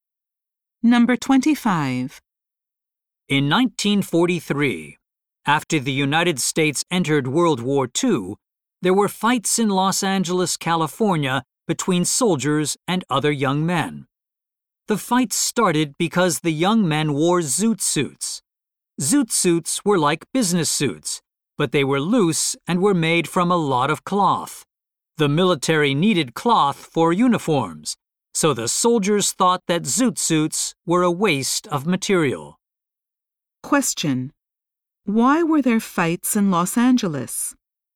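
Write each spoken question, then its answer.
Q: Why were there fights in Los Angeles?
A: Soldiers thought zoot suits wasted cloth needed for uniforms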